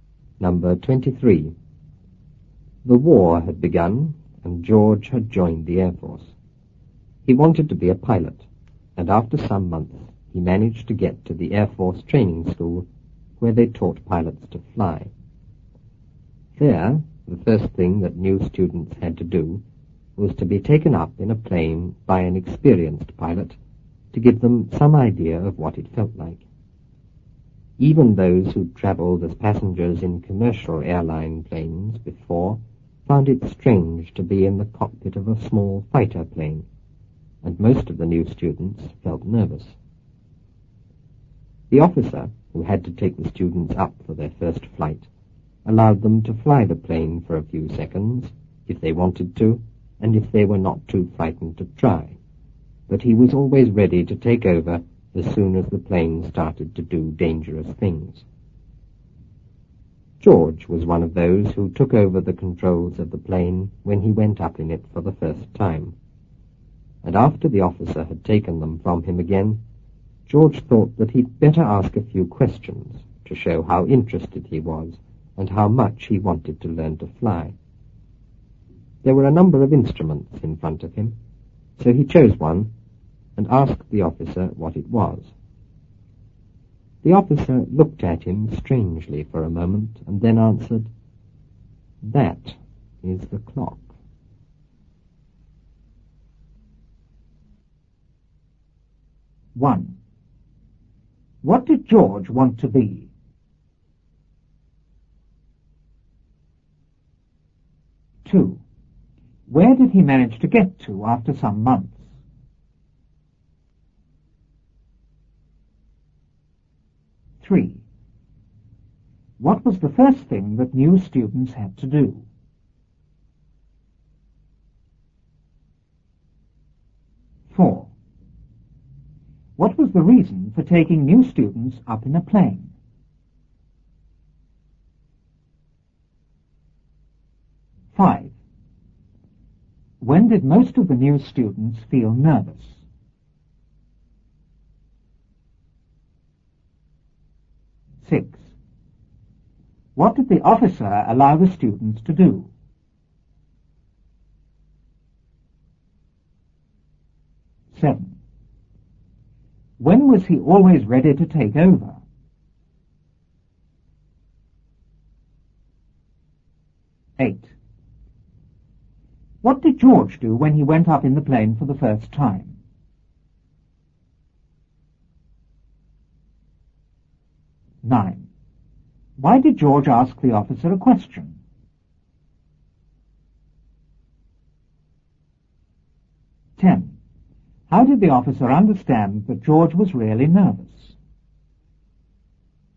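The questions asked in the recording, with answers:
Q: What did George want to be?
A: A pilot

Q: Where did he manage to get to after some months?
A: The Air Force training school

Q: What was the first thing that new students had to do?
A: Be taken up in a plane by an experienced pilot

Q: What was the reason for taking new students up in a plane?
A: To give them some idea of what it felt like

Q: When did most of the new students feel nervous?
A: When they were in the cockpit of a small fighter plane

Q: What did the officer allow the students to do?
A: Fly the plane for a few seconds

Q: When was he always ready to take over?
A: As soon as the plane started to do dangerous things

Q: What did George do when he went up in the plane for the first time?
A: He took over the controls of the plane

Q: Why did George ask the officer a question?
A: To show how interested he was and how much he wanted to learn to fly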